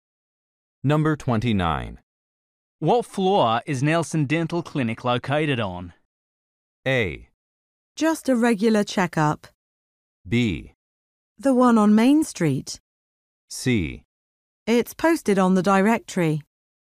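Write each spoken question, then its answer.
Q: What floor is Nelson Dental Clinic located on?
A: C: It's posted on the directory.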